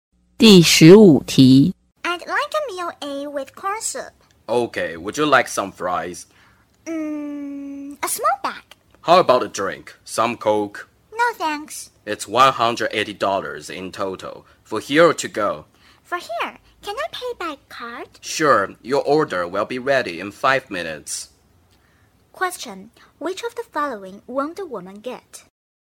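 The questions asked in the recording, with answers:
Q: Question. Which of the following won't the woman get?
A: A drink (Coke)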